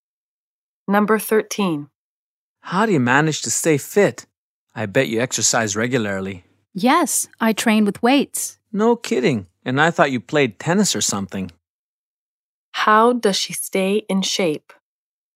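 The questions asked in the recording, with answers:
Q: How does she stay in shape?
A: She trains with weights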